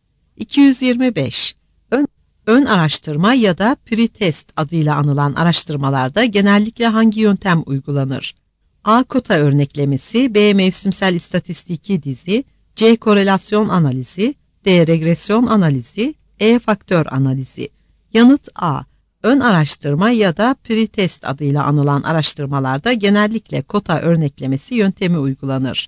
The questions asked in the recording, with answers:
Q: Ön araştırma ya da pretest adıyla anılan araştırmalarda genellikle hangi yöntem uygulanır?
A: Yanıt A.